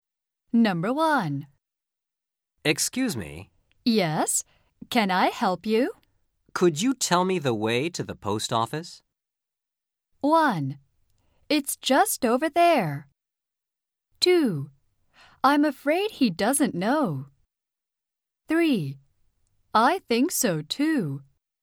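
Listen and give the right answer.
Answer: 1: It's just over there.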